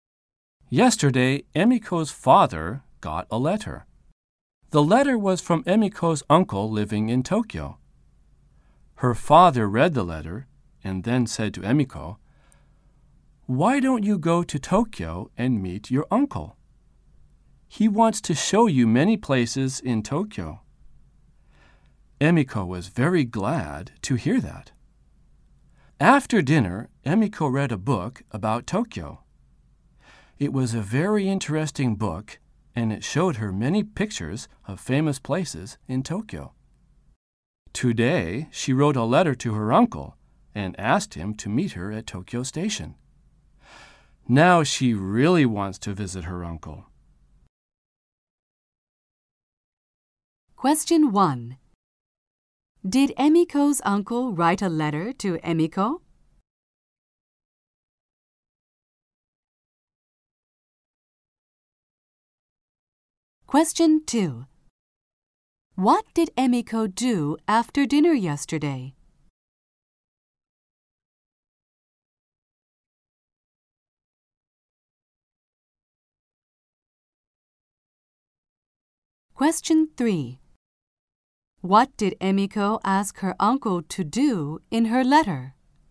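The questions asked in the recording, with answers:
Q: Did Emiko's uncle write a letter to Emiko?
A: No, he didn't. He wrote to her father.

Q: What did Emiko do after dinner yesterday?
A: She read a book about Tokyo.

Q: What did Emiko ask her uncle to do in her letter?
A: To meet her at Tokyo Station.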